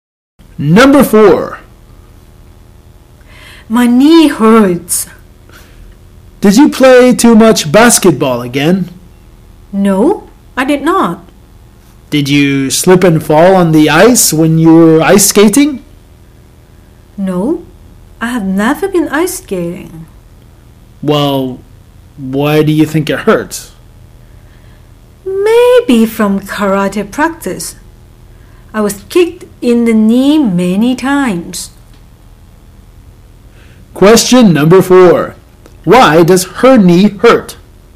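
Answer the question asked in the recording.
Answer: She was kicked in the knee many times at karate practice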